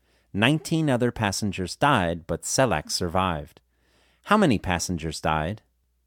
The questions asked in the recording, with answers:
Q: How many passengers died?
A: 19 passengers died.